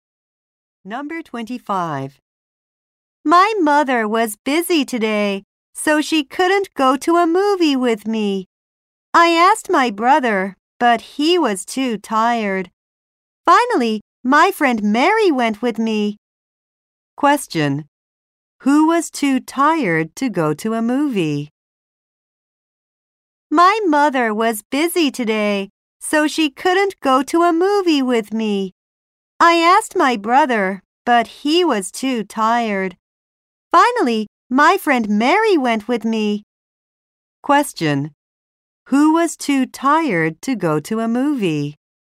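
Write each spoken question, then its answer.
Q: Who was too tired to go to a movie?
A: Her brother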